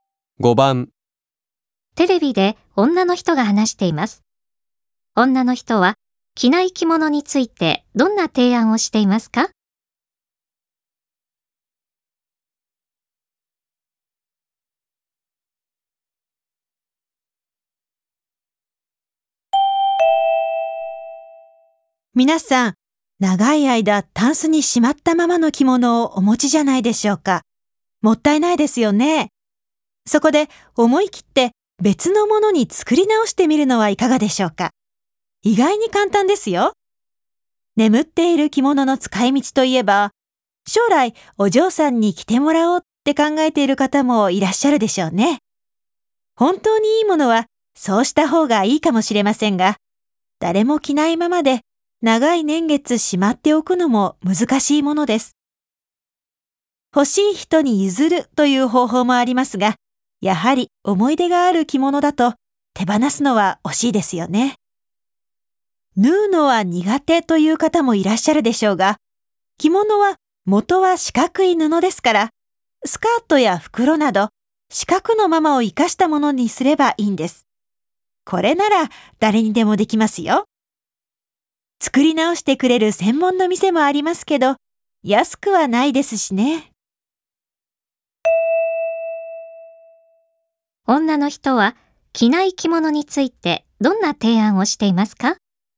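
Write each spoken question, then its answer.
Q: 女の人は着ない着物についてどんな提案をしていますか?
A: 自分でスカートや袋など別のものに作り直すこと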